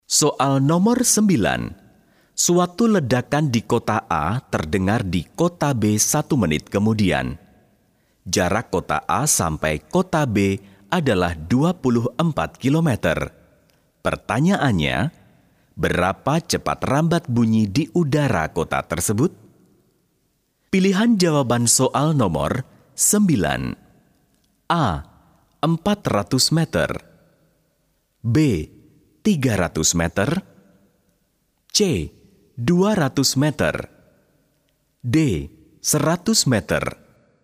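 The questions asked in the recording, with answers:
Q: Pertanyaannya, berapa cepat rambat bunyi di udara kota tersebut?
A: A: 400 meter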